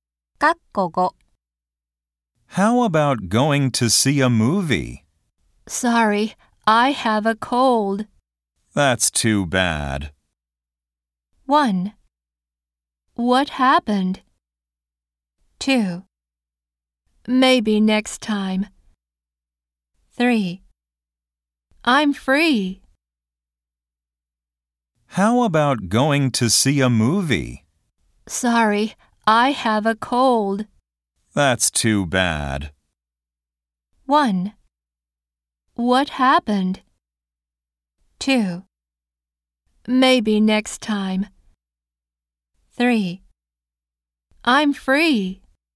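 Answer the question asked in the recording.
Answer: 2: Maybe next time.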